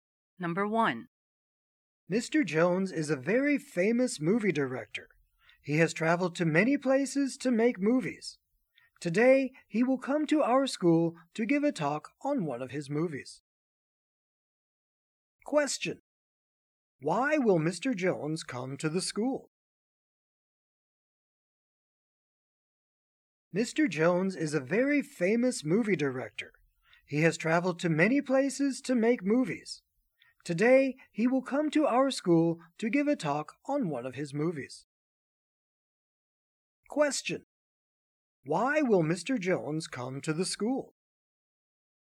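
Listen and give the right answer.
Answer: To give a talk on one of his movies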